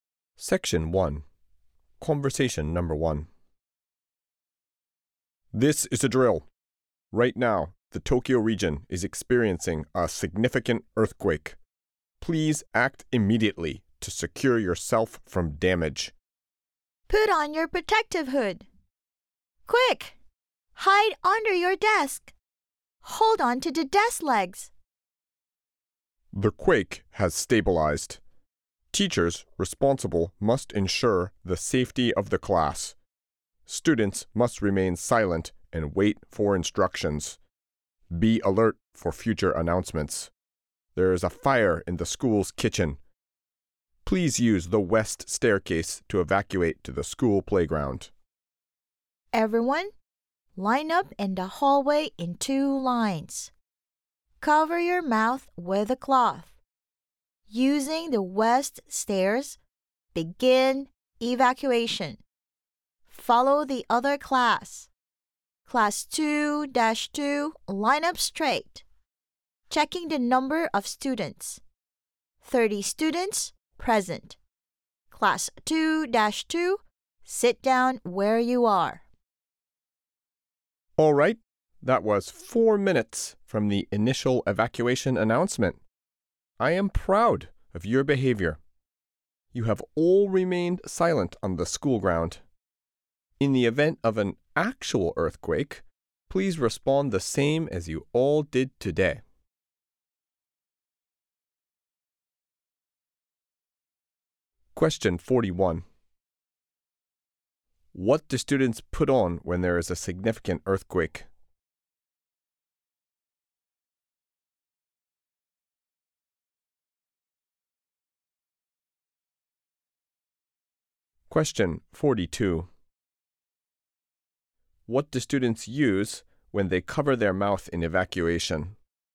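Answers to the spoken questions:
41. Their protective hood
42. A cloth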